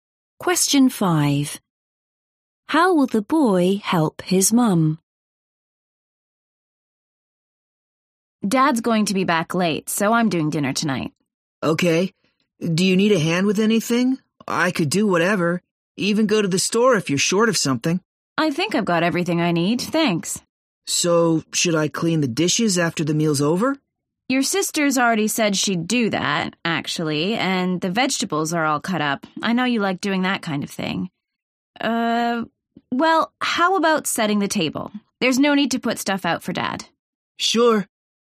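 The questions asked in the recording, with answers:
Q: How will the boy help his mum?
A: By setting the table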